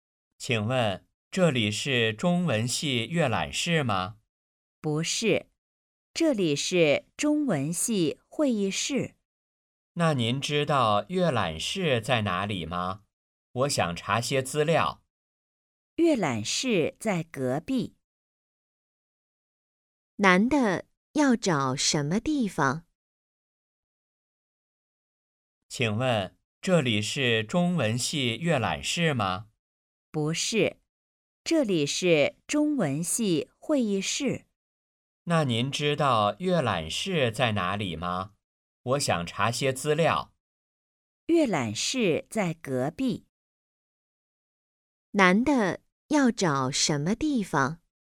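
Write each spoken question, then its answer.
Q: 男的要找什么地方?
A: 中文系阅览室

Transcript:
男:请问,这里是中文系阅览室吗?
女:不是,这里是中文系会议室。
男:那您知道阅览室在哪里吗?我想查些资料。
女:阅览室在隔壁。
问:男的要找什么地方?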